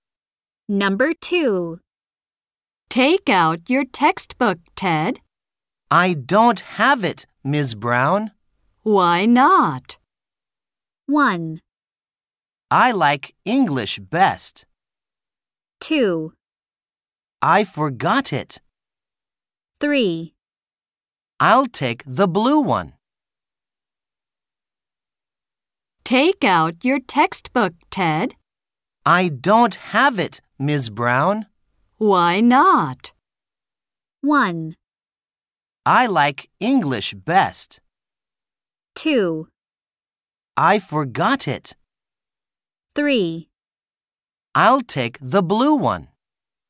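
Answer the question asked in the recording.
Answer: 2: I forgot it.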